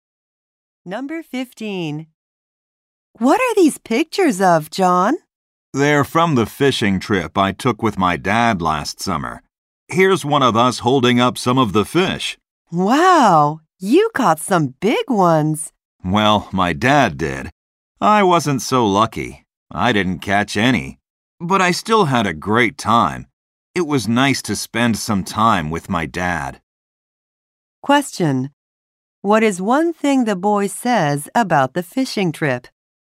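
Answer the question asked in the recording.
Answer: He didn't catch any fish but had a great time with his dad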